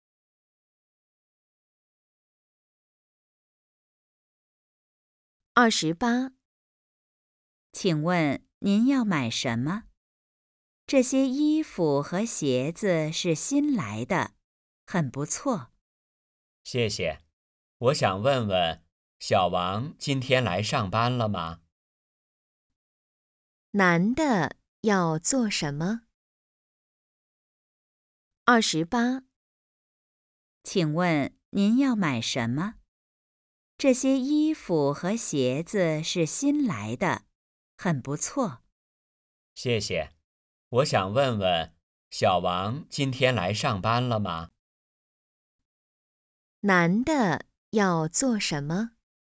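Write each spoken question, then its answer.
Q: 男的要做什么?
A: 找小王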